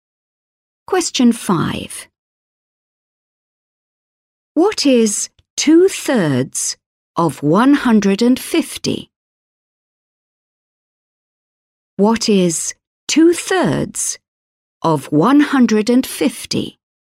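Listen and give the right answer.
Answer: 100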